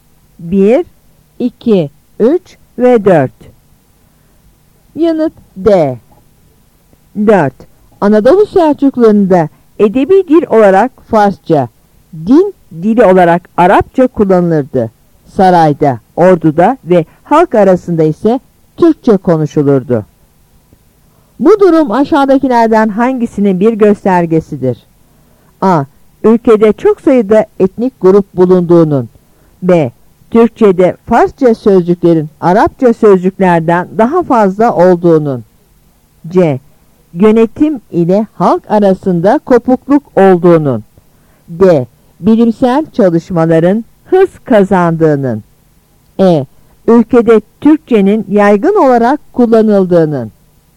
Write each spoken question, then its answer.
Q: Bu durum aşağıdakilerden hangisinin bir göstergesidir?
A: Yanıt E.